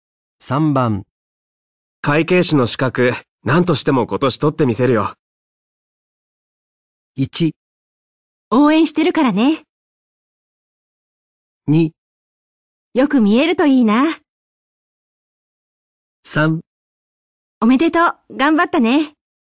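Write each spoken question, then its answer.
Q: 会計士の資格、何としても今年取ってみせるよ。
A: 1: 応援してるからね。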